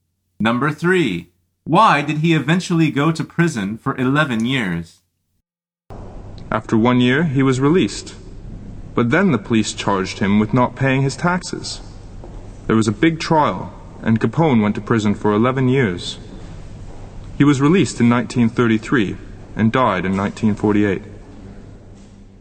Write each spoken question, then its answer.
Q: why did he eventually go to prison for 11 years?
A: The answer is for not paying his taxes.